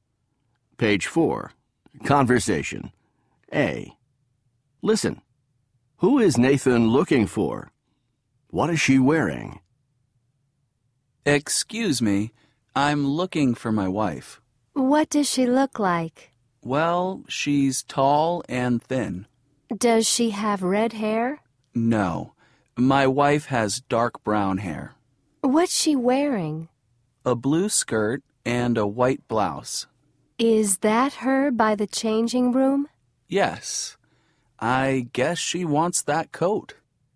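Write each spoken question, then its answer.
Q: Who is Nathan looking for?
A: His wife

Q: What is she wearing?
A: A blue skirt and a white blouse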